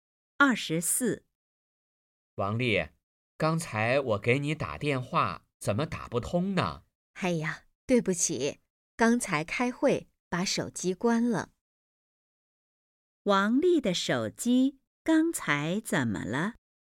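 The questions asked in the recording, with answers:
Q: 王丽的手机刚才怎么了?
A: 关机了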